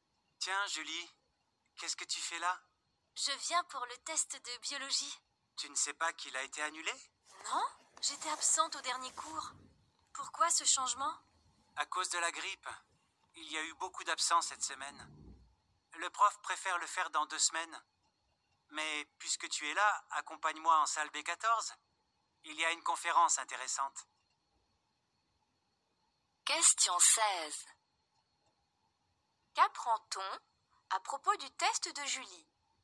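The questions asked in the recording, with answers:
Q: Qu'apprend-on à propos du test de Julie?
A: Il a été annulé et reporté dans 2 semaines à cause de la grippe.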